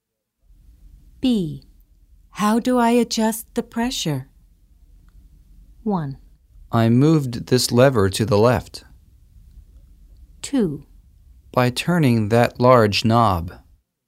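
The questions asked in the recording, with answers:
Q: How do I adjust the pressure?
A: 2: By turning that large knob.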